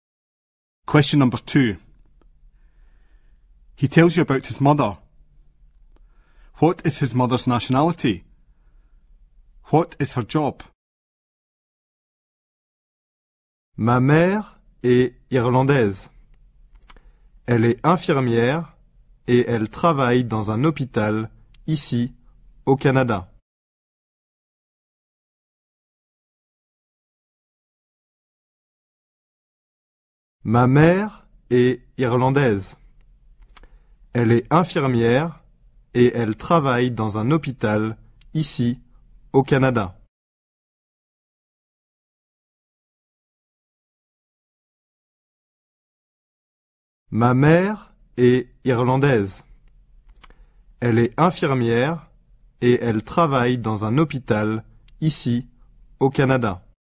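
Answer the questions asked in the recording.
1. Irish
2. Nurse (in a hospital)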